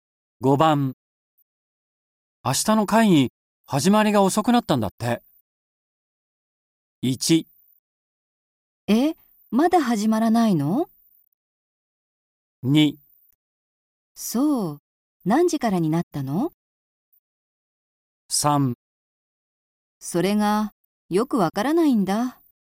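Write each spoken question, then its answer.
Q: 明日の会議始まりが遅くなったんだって。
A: 2: そう、何時からになったの?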